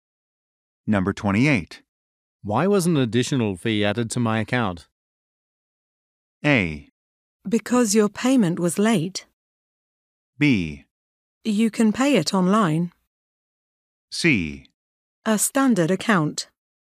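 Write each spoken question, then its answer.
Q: Why was an additional fee added to my account?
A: A: Because your payment was late.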